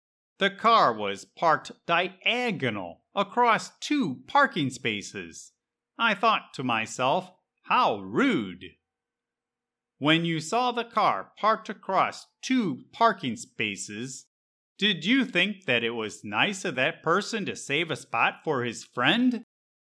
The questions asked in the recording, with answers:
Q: When you saw the car parked across two parking spaces, did you think that it was nice of that person to save a spot for his friend?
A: No, I did not think that it was nice at all.